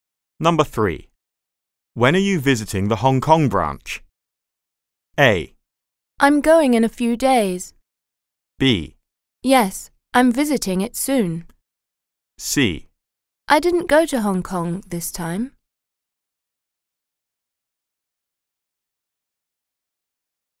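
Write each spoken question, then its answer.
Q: When are you visiting the Hong Kong branch?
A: A: I'm going in a few days.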